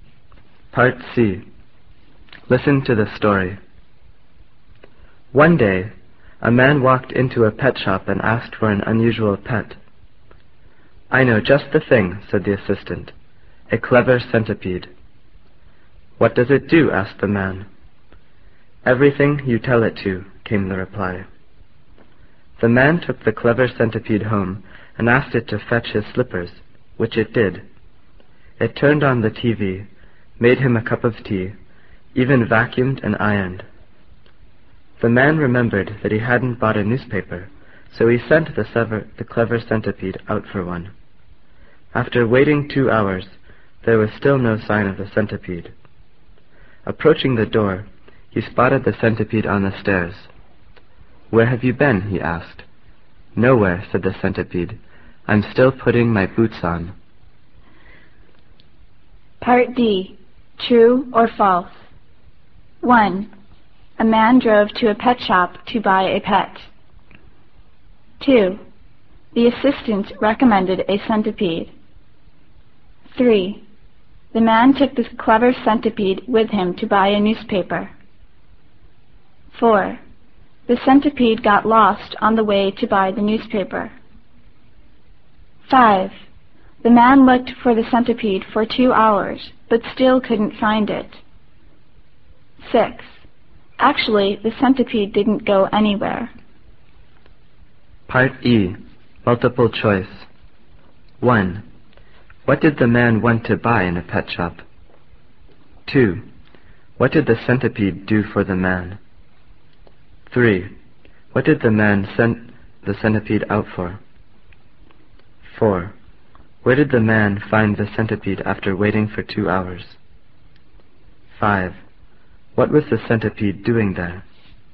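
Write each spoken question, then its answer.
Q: A man drove to a pet shop to buy a pet.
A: False

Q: The assistant recommended a centipede.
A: True

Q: The man took this clever centipede with him to buy a newspaper.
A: False

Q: The centipede got lost on the way to buy the newspaper.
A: False

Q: The man looked for the centipede for 2 hours, but still couldn't find it.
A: False

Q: Actually, the centipede didn't go anywhere.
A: True

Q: What did the man want to buy in a pet shop?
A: An unusual pet

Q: What did the centipede do for the man?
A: Everything he told it to: fetched slippers, turned on the TV, made tea, vacuumed and ironed

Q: What did the man send the centipede out for?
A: A newspaper

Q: Where did the man find the centipede after waiting for 2 hours?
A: On the stairs

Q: What was the centipede doing there?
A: Putting its boots on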